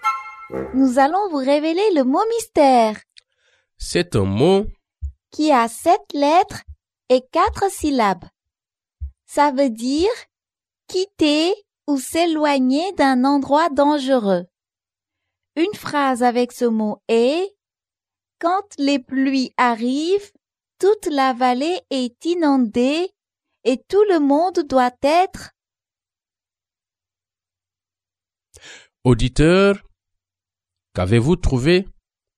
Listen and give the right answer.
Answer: Le mot mystère est évacuer.